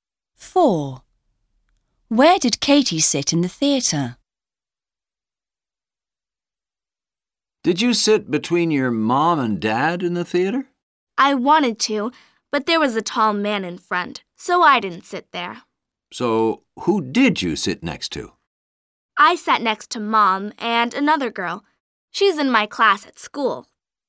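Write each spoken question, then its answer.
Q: Where did Katie sit in the theater?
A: next to Mom and a girl from her class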